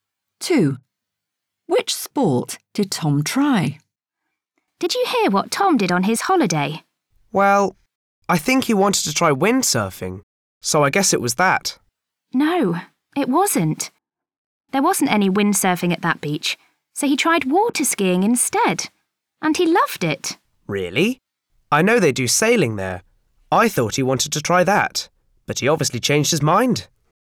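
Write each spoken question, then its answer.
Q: Which sport did Tom try?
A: water skiing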